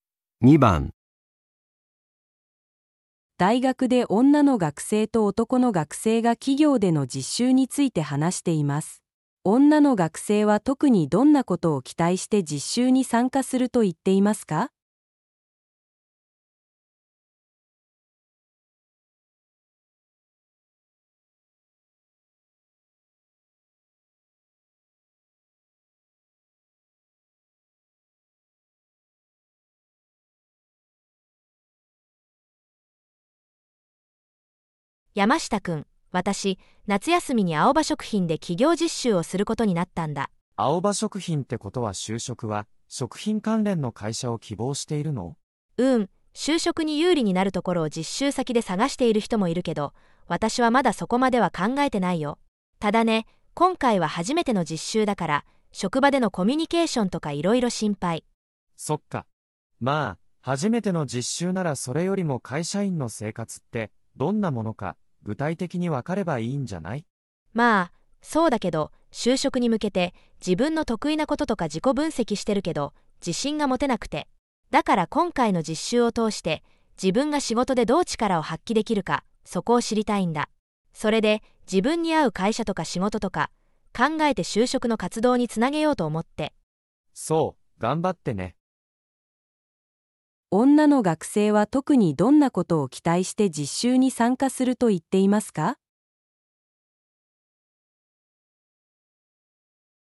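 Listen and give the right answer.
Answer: 自分が仕事でどう力を発揮できるか知ること

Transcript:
大学で女の学生と男の学生が企業での実習について話しています。女の学生は特にどんなことを期待して実習に参加すると言っていますか。
女:山下くん。私、夏休みにアオバ食品で企業実習をすることになったんだ。
男:アオバ食品ってことは就職は食品関連の会社を希望しているの?
女:うーん、就職に有利になるところを実習先で探している人もいるけど、私はまだそこまでは考えてないよ。ただね、今回は初めての実習だから職場でのコミュニケーションとかいろいろ心配。
男:そっか。まぁ、初めての実習ならそれよりも会社員の生活ってどんなものか具体的にわかればいいんじゃない?
女:まぁ、そうだけど、就職に向けて自分の得意なこととか自己分析してるけど自信が持てなくて・・・。だから今回の実習を通して自分が仕事でどう力を発揮できるか、そこを知りたいんだ。それで自分に合う会社とか仕事とか考えて就職の活動に繋げようと思って。
男:そう、頑張ってね。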